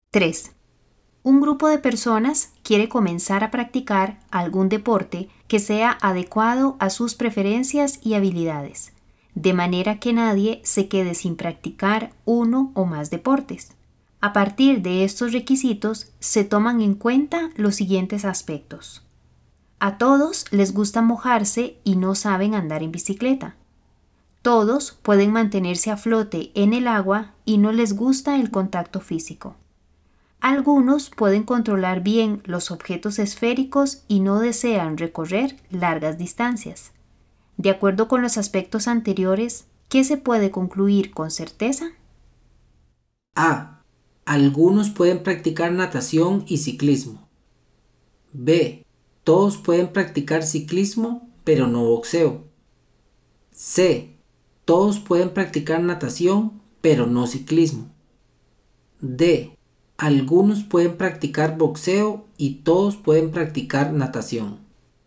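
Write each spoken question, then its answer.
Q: De acuerdo con los aspectos anteriores, ¿qué se puede concluir con certeza?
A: C: Todos pueden practicar natación, pero no ciclismo.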